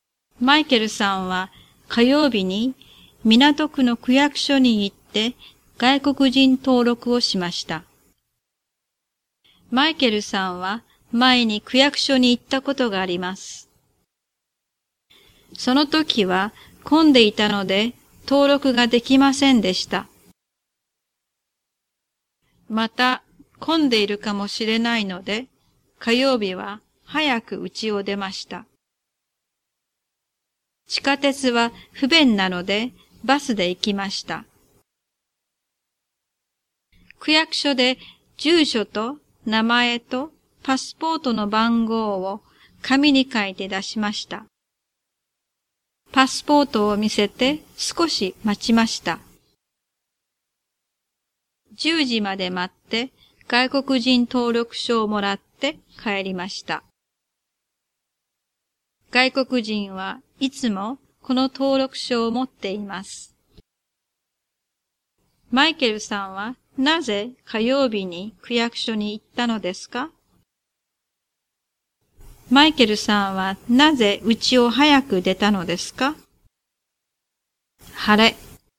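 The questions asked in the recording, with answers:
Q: マイケルさんはなぜ家を早く出たのですか?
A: また混んでいるかもしれないから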